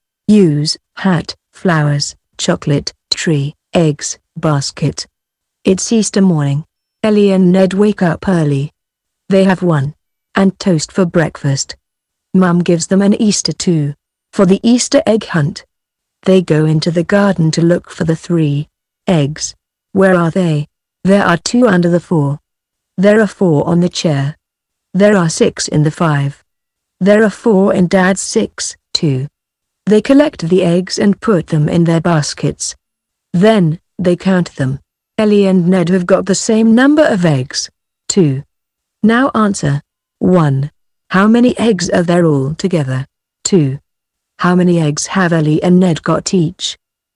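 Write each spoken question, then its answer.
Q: How many eggs are there all together?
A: 16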